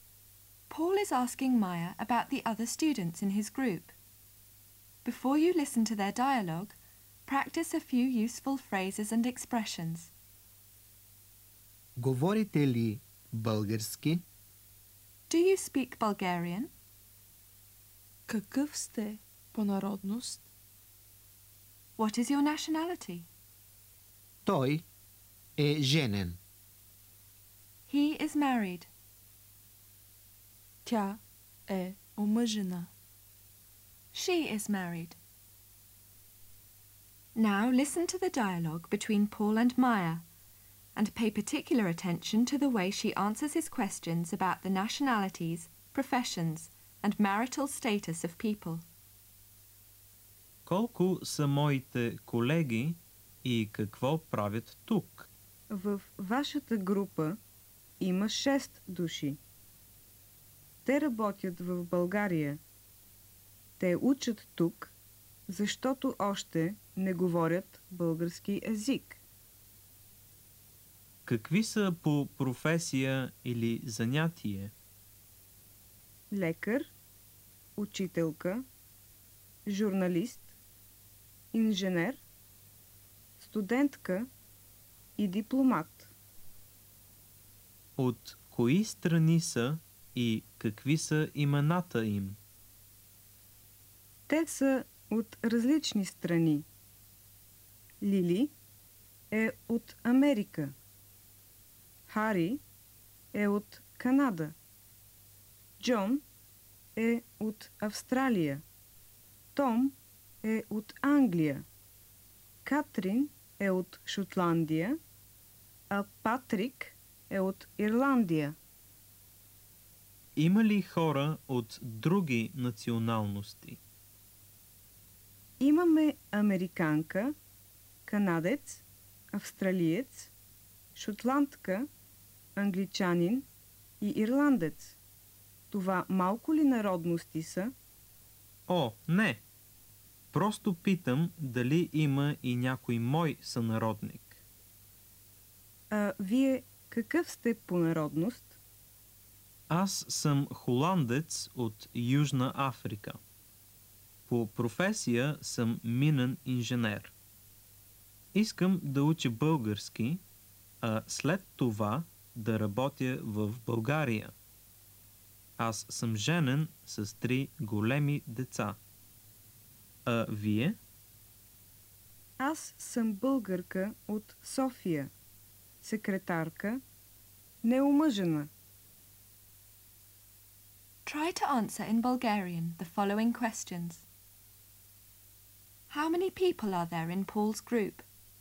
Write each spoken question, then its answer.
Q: How many people are there in Paul's group?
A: В групата на Пол има 6 души.